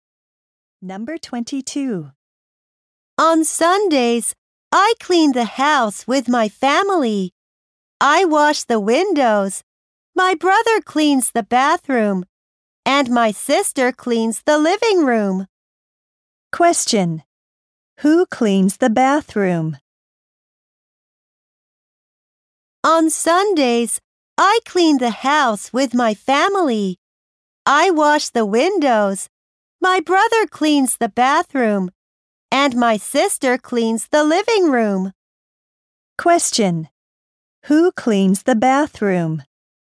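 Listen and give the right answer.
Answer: The boy's brother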